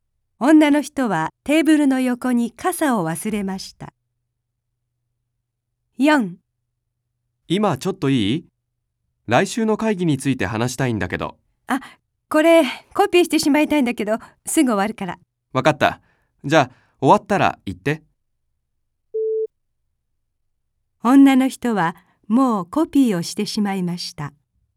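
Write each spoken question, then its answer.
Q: 女の人はもうコピーをしてしまいました。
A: 正しくない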